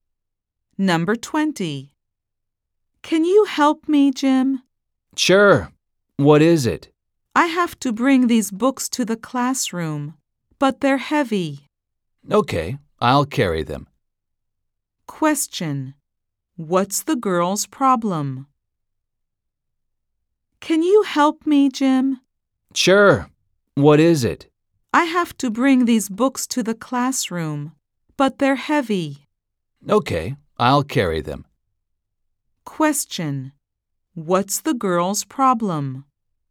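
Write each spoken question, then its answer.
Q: What's the girl's problem?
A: Her books are too heavy to carry to the classroom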